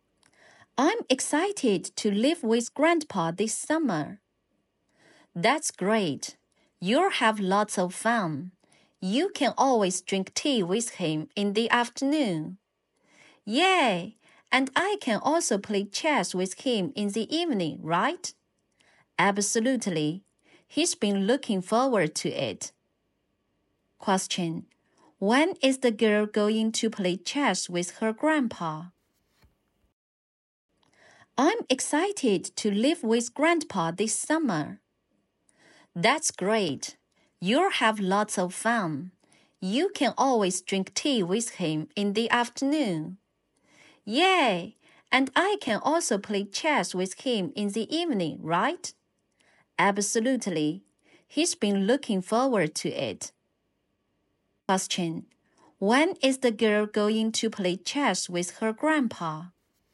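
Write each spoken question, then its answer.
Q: When is the girl going to play chess with her grandpa?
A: In the evening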